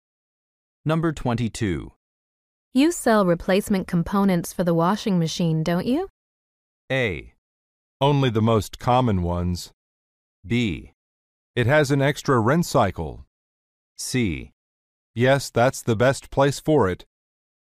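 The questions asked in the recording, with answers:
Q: You sell replacement components for the washing machine, don't you?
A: A: Only the most common ones.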